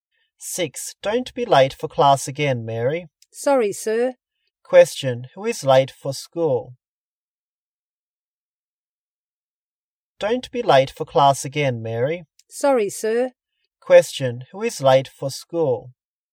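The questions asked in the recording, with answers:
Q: Who is late for school?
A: Mary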